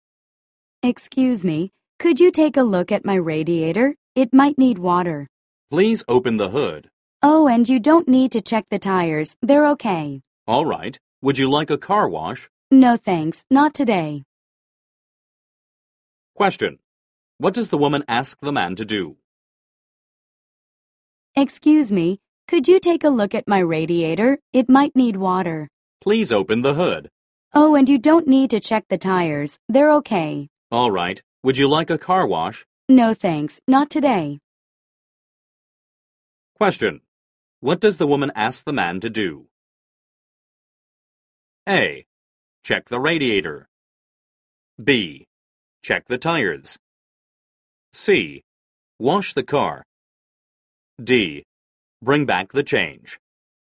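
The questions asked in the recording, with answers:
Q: What does the woman ask the man to do?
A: A: Check the radiator.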